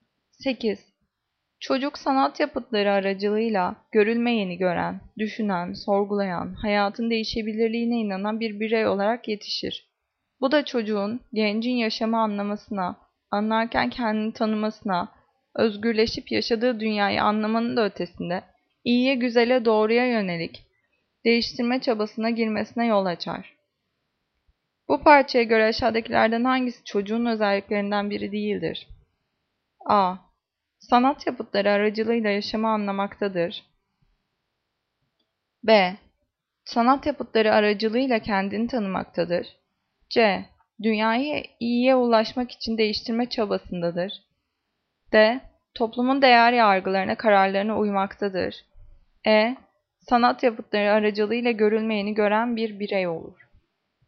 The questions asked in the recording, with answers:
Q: Bu parçaya göre aşağıdakilerden hangisi çocuğun özelliklerinden biri değildir?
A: Cevap D. Toplumun değer yargılarına, kararlarına uymaktadır.